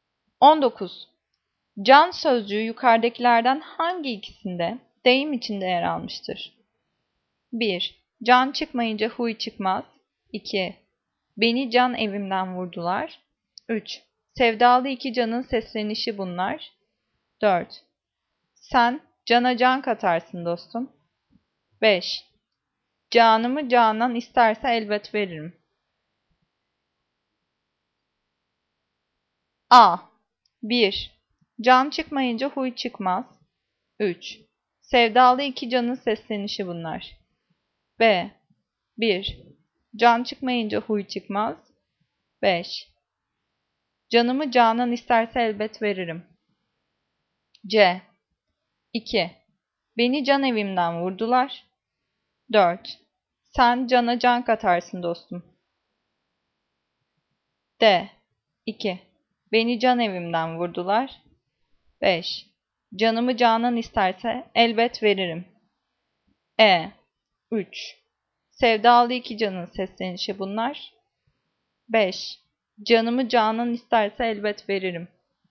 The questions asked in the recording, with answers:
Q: Can sözcüğü yukarıdakilerden hangi ikisinde deyim içinde yer almıştır?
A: Cevap C. 2. Beni can evimden vurdular.